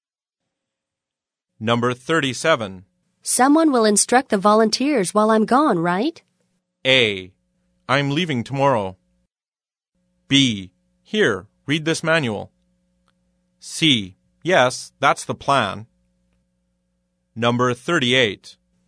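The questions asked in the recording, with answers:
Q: Someone will instruct the volunteers while I'm gone, right?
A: C: Yes, that's the plan.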